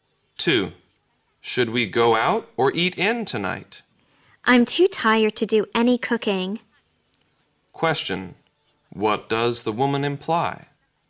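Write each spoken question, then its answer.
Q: Question, what does the woman imply?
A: She wants to go out to eat.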